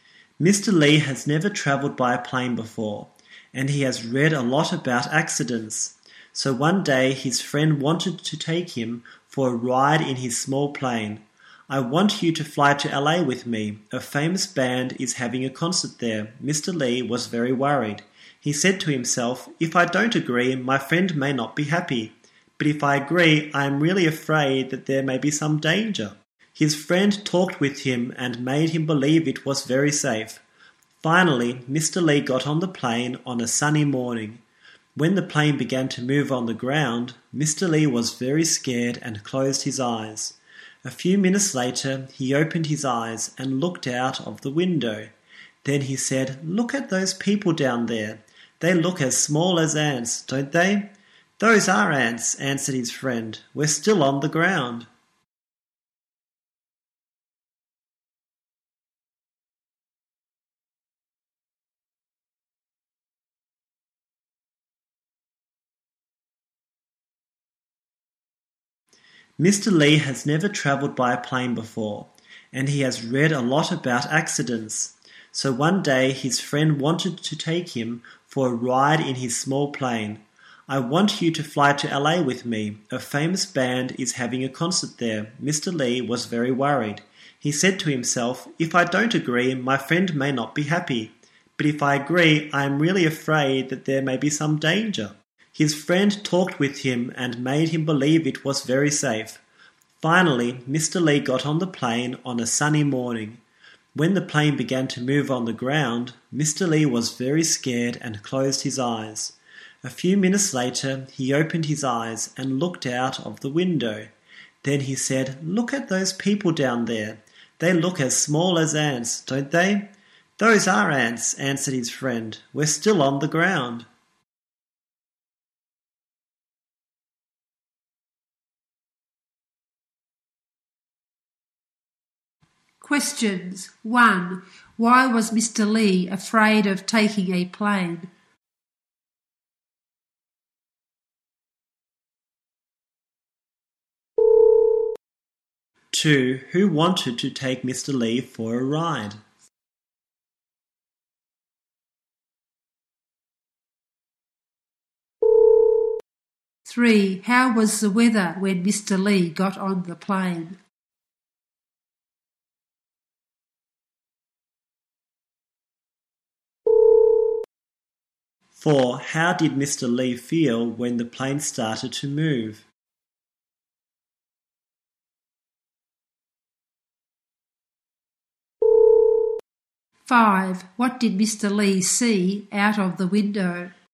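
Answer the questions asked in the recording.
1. He had read a lot about accidents
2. His friend
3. Sunny
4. Very scared
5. Ants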